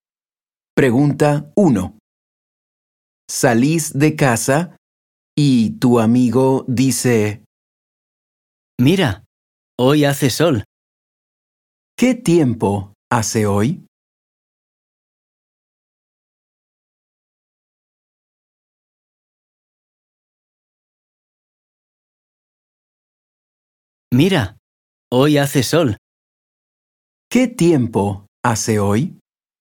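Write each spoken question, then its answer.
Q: ¿Qué tiempo hace hoy?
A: Hace sol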